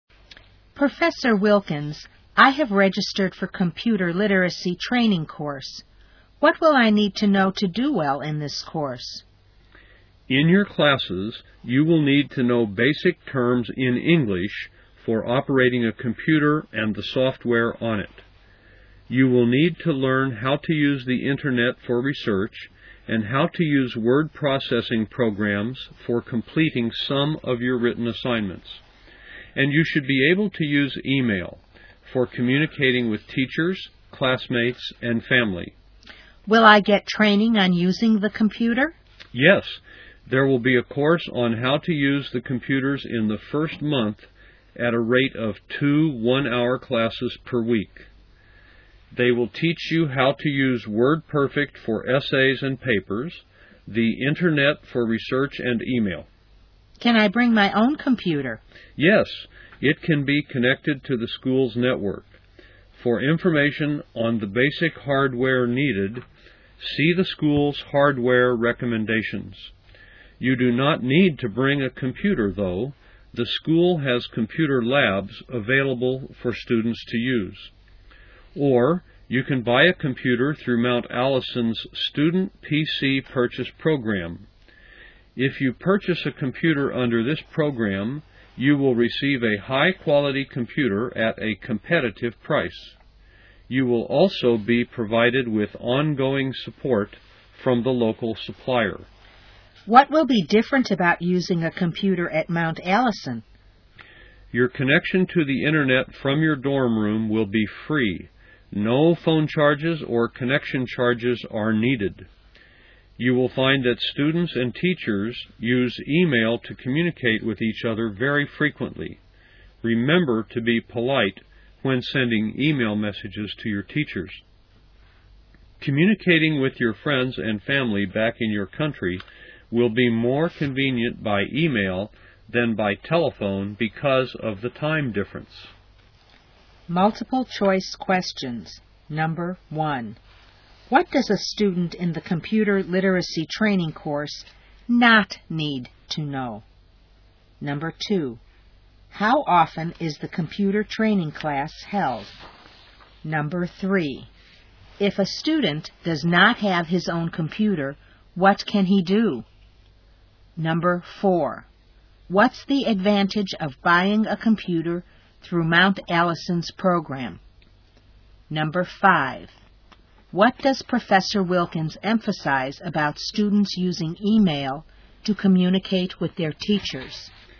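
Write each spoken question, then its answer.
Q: how often is the computer training class held?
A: Twice a week (two one-hour classes per week) in the first month

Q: if a student does not have his own computer, what can he do?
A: Use the school's computer labs or buy one through the Student PC Purchase Program

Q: what's the advantage of buying a computer through Mount Allison's program?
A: A high-quality computer at a competitive price, with ongoing support from the local supplier

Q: what does Professor Wilkins emphasize about students using email to communicate with their teachers?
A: They should be polite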